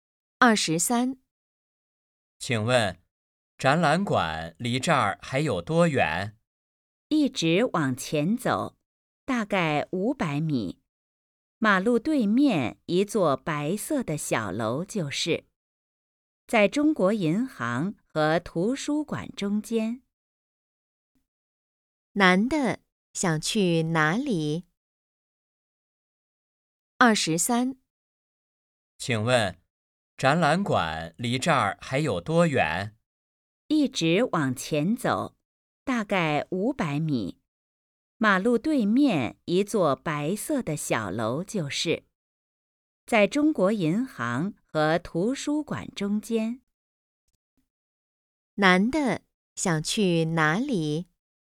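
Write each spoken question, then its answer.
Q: 男的想去哪里?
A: 展览馆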